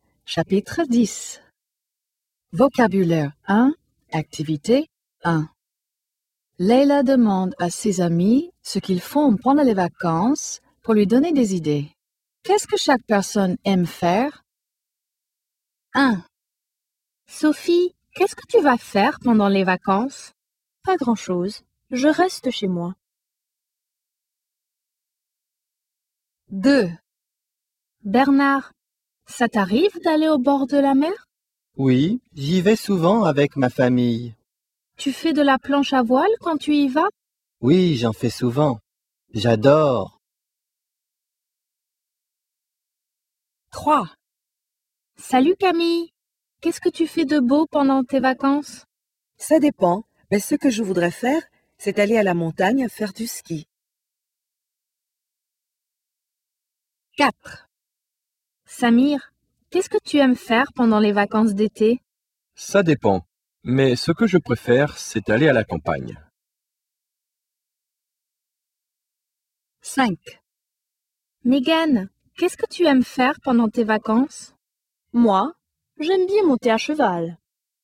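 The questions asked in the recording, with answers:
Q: Qu'est-ce que chaque personne aime faire?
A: Sophie reste chez elle.

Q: Qu'est-ce que chaque personne aime faire?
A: Bernard aime faire de la planche à voile au bord de la mer.

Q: Qu'est-ce que chaque personne aime faire?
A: Camille voudrait faire du ski à la montagne.

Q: Qu'est-ce que chaque personne aime faire?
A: Samir préfère aller à la campagne.

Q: Qu'est-ce que chaque personne aime faire?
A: Megan aime monter à cheval.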